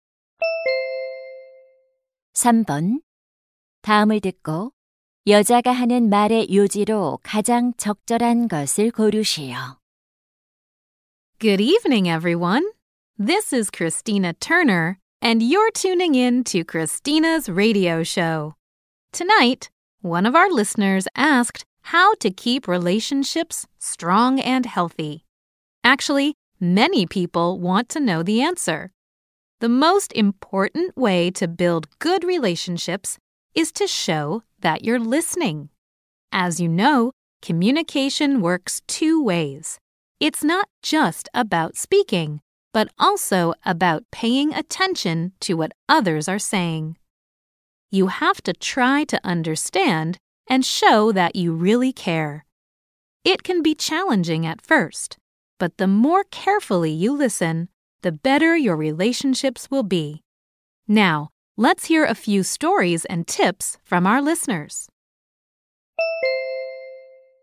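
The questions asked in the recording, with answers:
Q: 다음을 듣고 여자가 하는 말의 요지로 가장 적절한 것을 고르시오.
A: 좋은 관계를 위해서는 경청하는 태도를 보여야 한다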